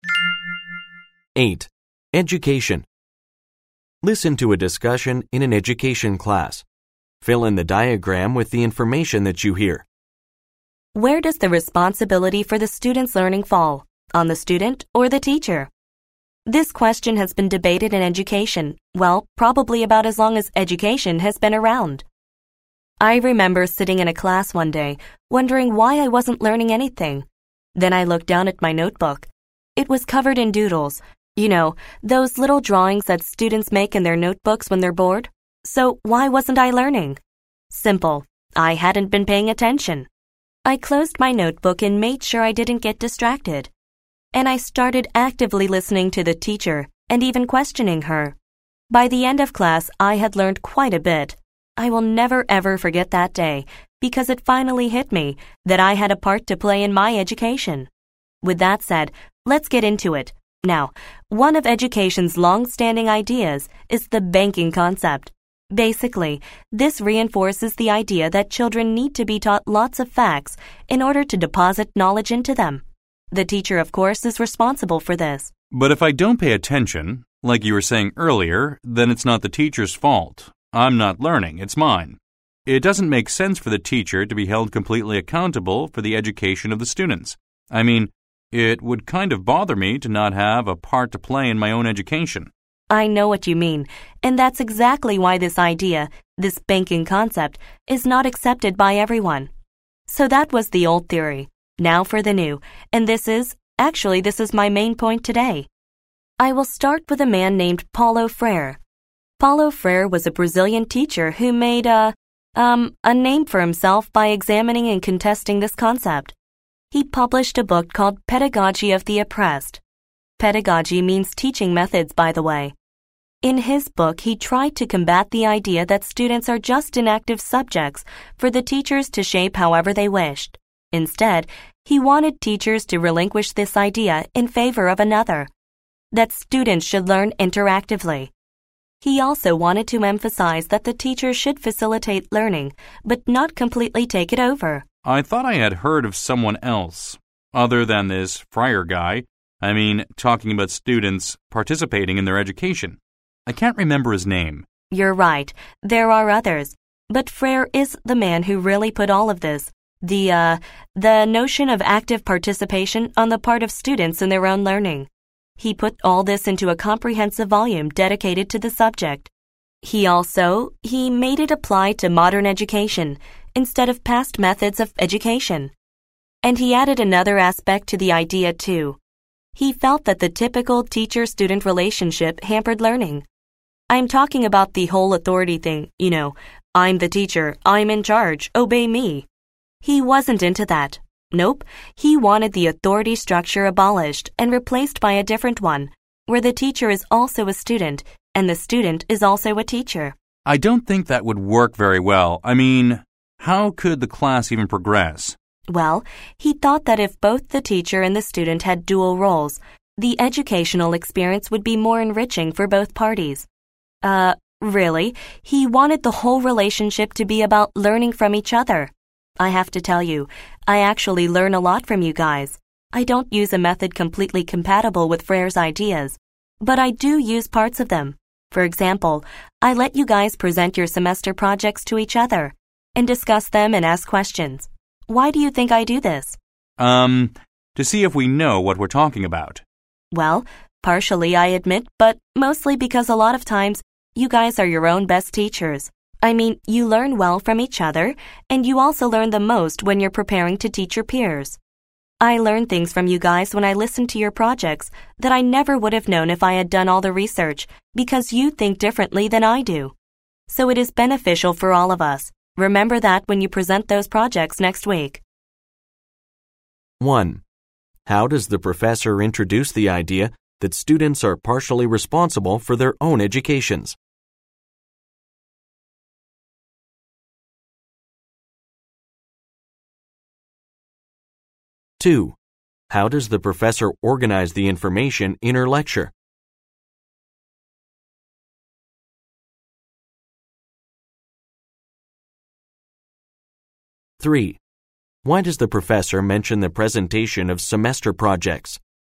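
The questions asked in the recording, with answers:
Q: How does the professor introduce the idea that students are partially responsible for their own educations?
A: By telling a personal story about doodling in class instead of paying attention and then learning once she listened actively

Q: how does the professor organize the information in her lecture?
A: She contrasts the old theory (the banking concept) with a newer one (Paulo Freire's ideas)

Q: why does the professor mention the presentation of semester projects?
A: To give an example of how she uses Freire's ideas: students learn from teaching each other, and she learns from them too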